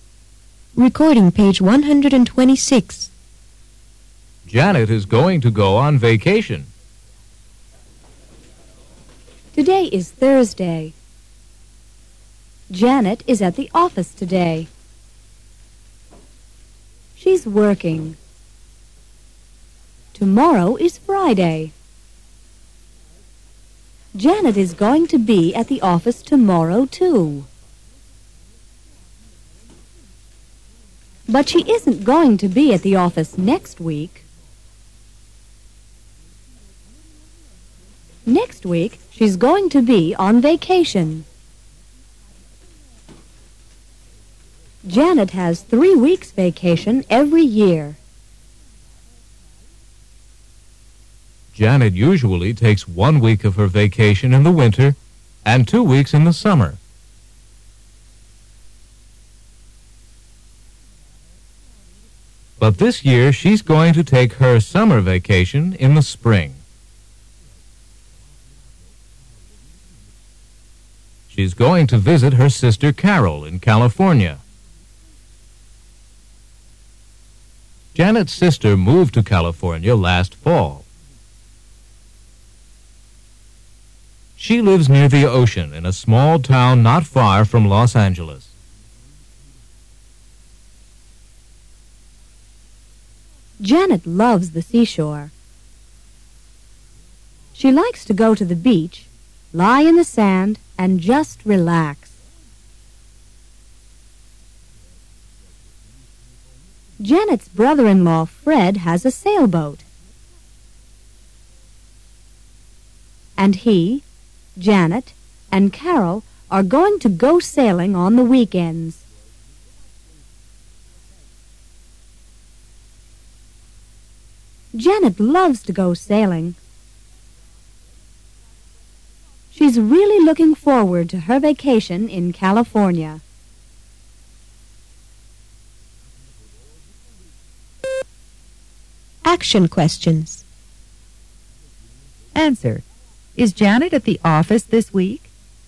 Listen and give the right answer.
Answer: Yes, she is.